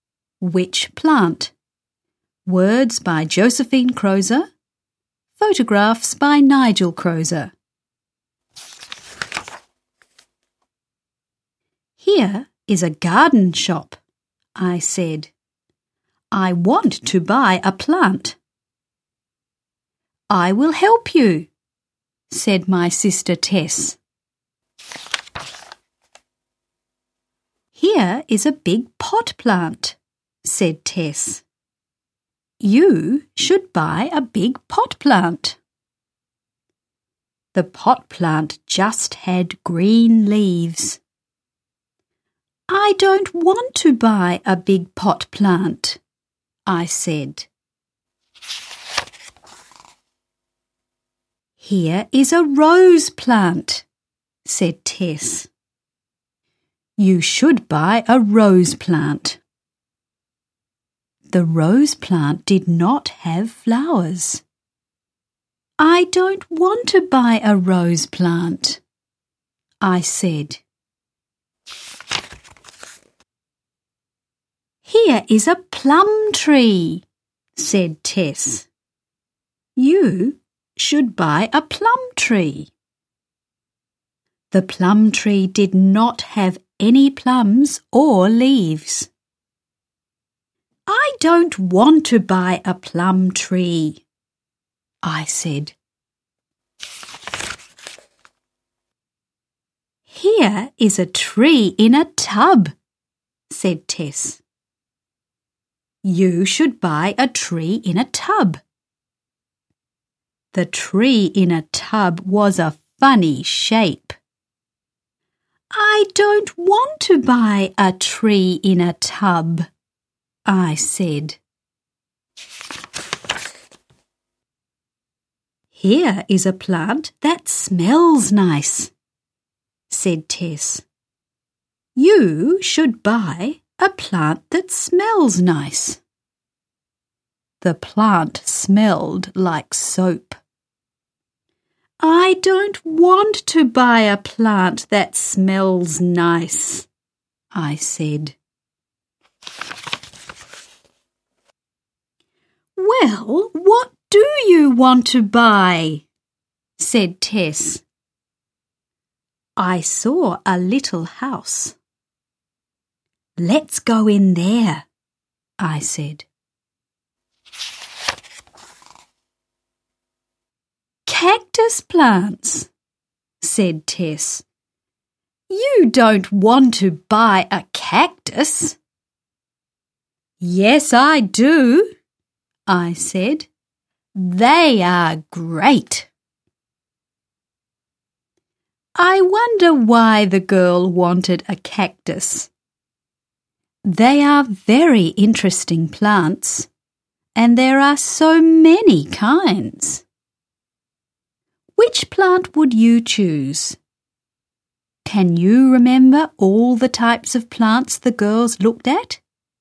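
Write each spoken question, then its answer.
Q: Can you remember all the types of plants the girls looked at?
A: a big pot plant, a rose plant, a plum tree, a tree in a tub, a plant that smells nice, and cactus plants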